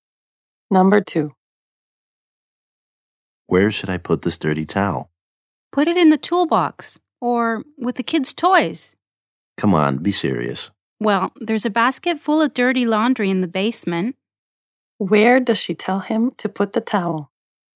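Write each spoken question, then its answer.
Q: Where does she tell him to put the towel?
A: In the basket of dirty laundry in the basement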